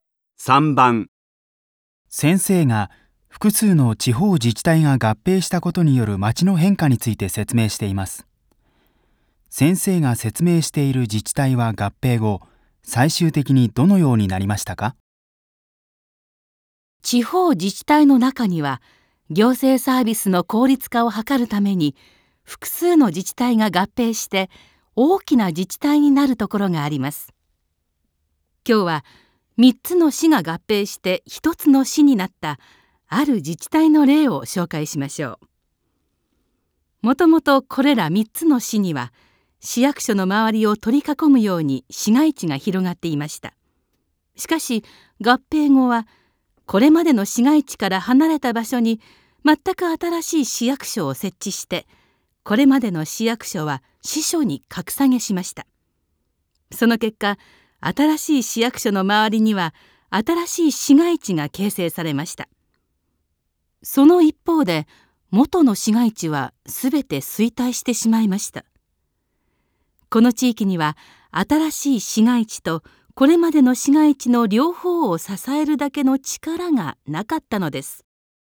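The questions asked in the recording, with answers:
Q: 先生が説明している自治体は合併後最終的にどのようになりましたか?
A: 新しい市役所の周りに新しい市街地ができ、元の市街地はすべて衰退した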